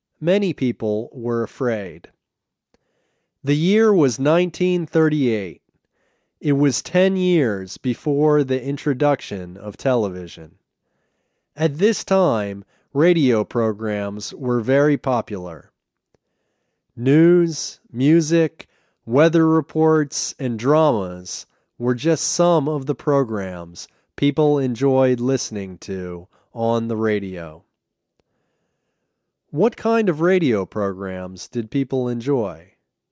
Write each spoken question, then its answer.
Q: What kind of radio programs did people enjoy?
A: They enjoyed news, music, weather reports, and dramas.